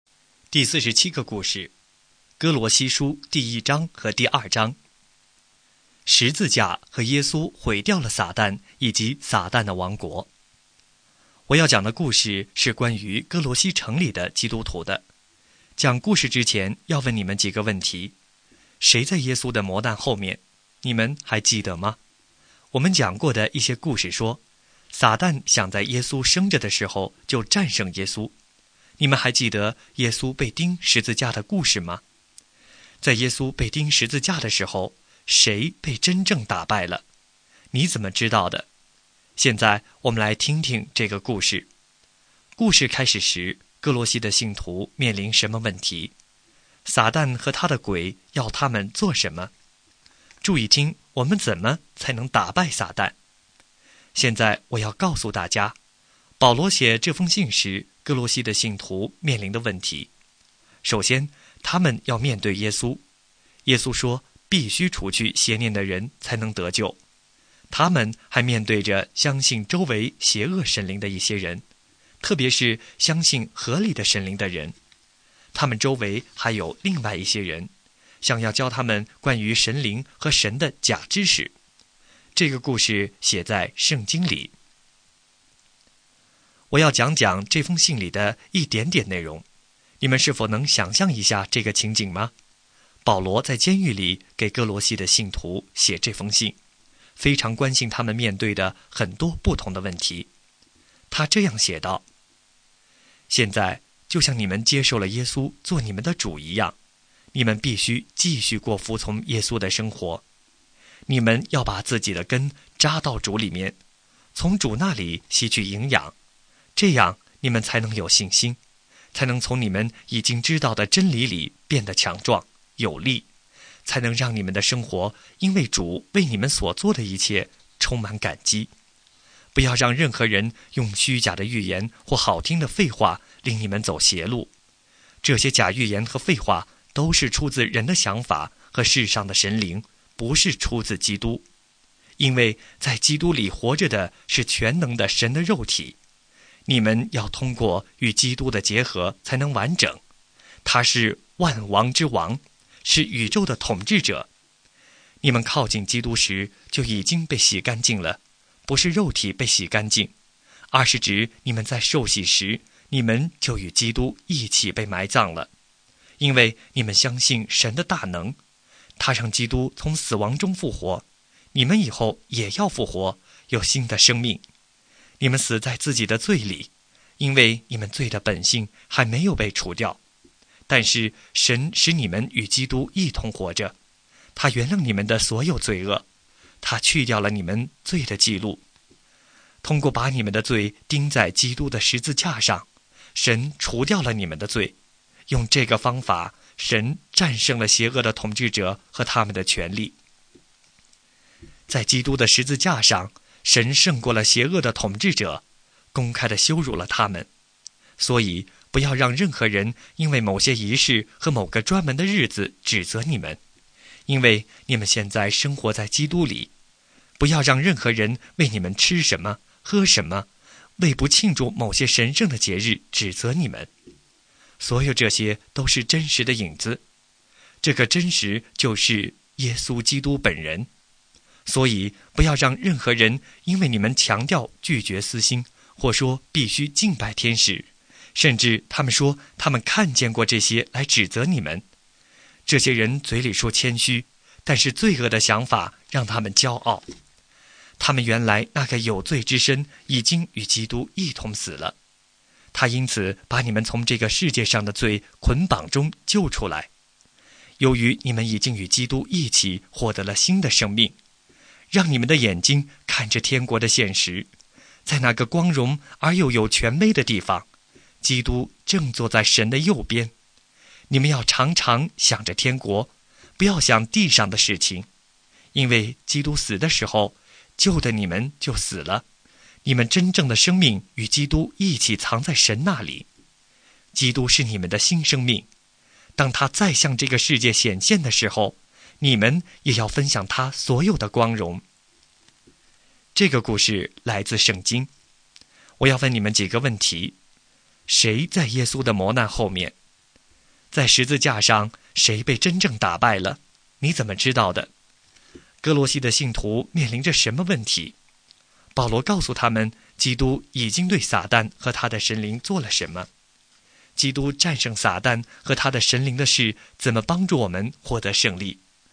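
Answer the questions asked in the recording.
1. 撒旦和邪恶的统治者
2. 有人说必须除去邪念才能得救,有人相信邪恶神灵,还有人教关于神灵和神的假知识
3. 在十字架上战胜了他们,公开羞辱了他们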